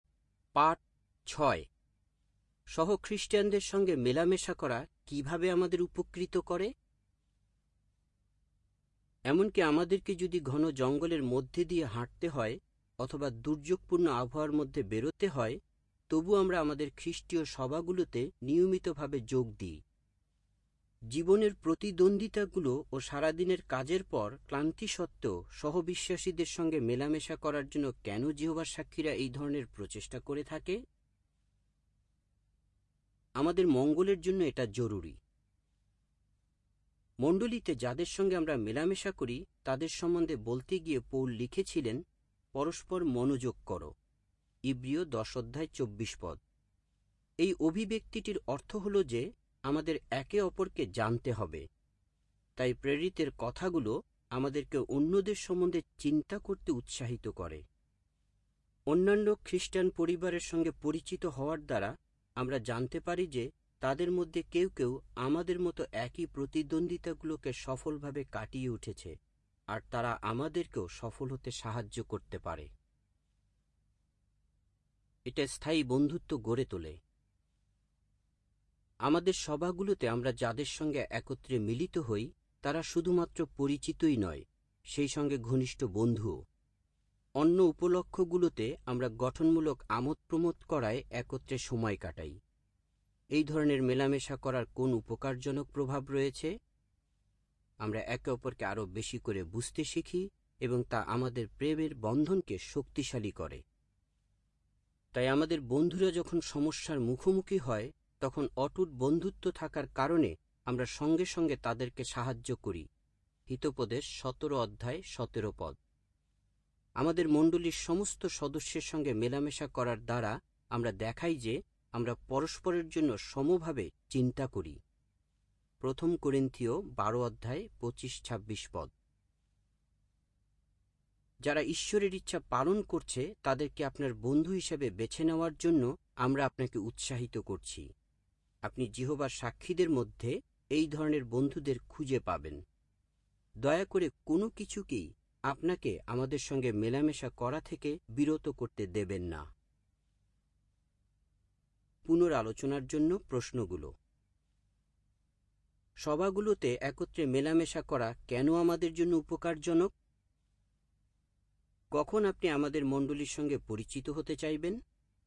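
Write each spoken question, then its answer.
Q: সভাগুলোতে একত্রে মেলামেশা করা কেন আমাদের জন্য উপকারজনক?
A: আমরা একে অপরকে জানতে পারি, সফল হতে সাহায্য পাই এবং স্থায়ী বন্ধুত্ব ও প্রেমের বন্ধন শক্তিশালী হয়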